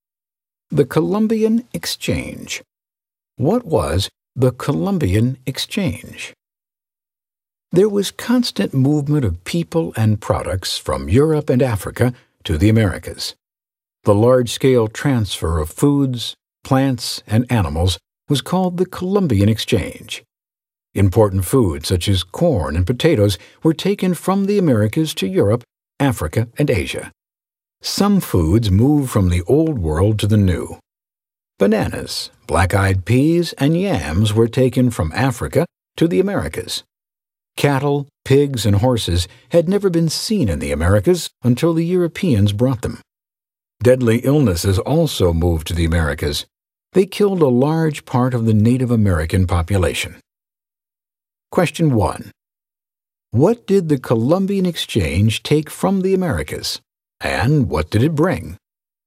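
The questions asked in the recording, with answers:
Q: What did the Columbian Exchange take from the Americas, and what did it bring?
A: It took foods like corn and potatoes from the Americas, and it brought bananas, black-eyed peas, yams, cattle, pigs, horses, and deadly diseases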